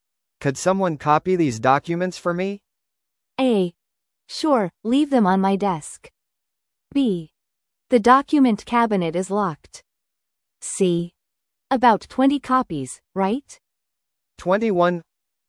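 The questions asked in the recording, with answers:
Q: Could someone copy these documents for me?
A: A: Sure, leave them on my desk.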